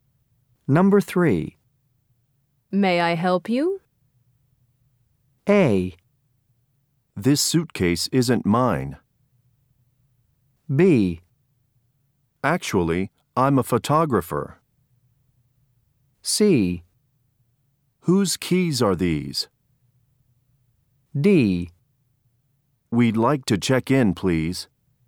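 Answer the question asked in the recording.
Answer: D: We'd like to check in, please.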